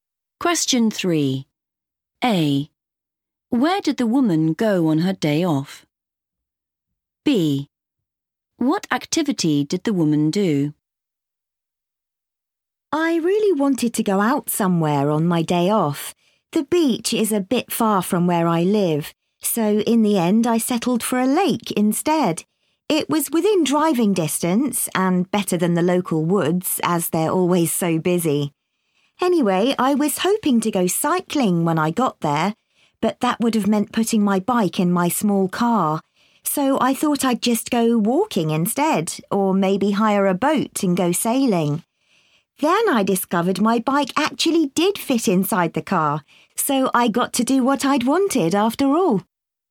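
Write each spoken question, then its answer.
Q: Where did the woman go on her day off?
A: a lake

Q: What activity did the woman do?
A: cycling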